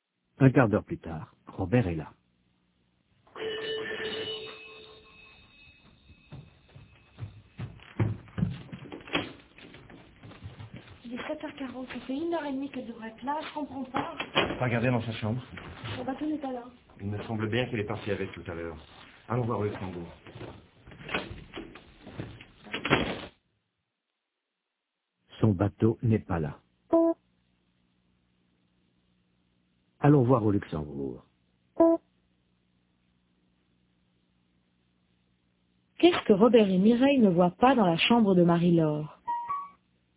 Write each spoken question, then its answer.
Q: Qu'est-ce que Robert et Mireille ne voient pas dans la chambre de Marie-Laure?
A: Son bateau.